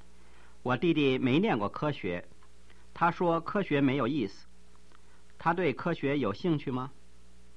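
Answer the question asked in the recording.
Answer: 没有兴趣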